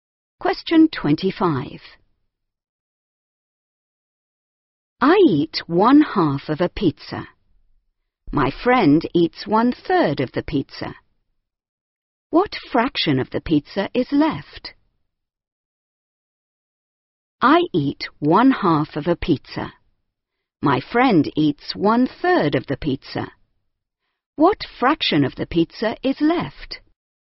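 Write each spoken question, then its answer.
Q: What fraction of the pizza is left?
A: 1/6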